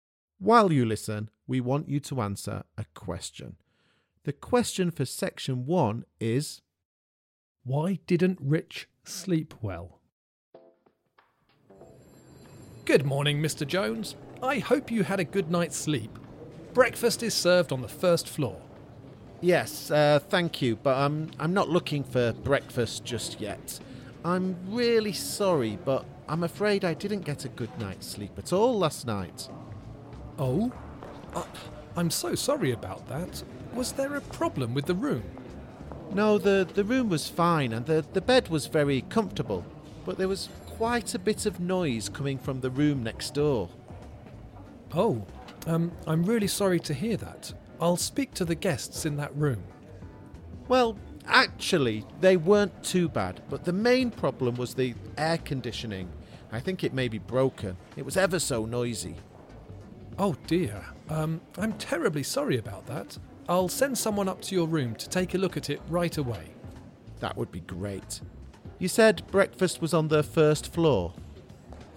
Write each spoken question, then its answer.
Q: Why didn't Rich sleep well?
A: Well, it was because the air conditioning was making a lot of noise in your room.